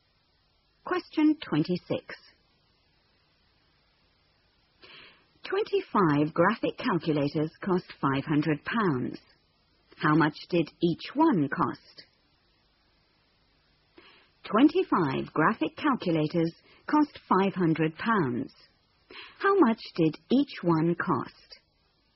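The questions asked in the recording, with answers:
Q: How much did each one cost?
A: £20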